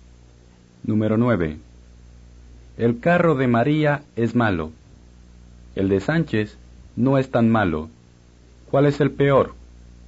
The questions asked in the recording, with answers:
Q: ¿Cuál es el peor?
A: El carro de María. O, el de María es el peor.